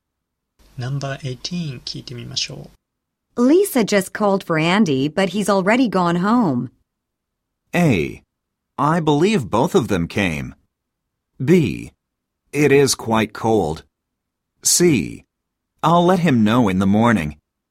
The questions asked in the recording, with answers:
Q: Lisa just called for Andy, but he's already gone home.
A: 正解は C です。I'll let him know in the morning.